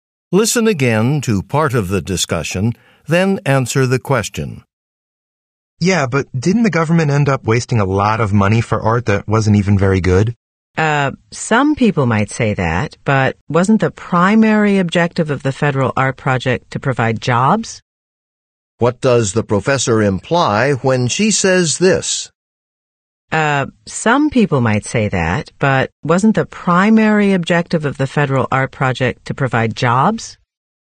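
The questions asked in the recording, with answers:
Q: What does the professor imply when she says this?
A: The art's quality mattered less, since the project's main goal was to create jobs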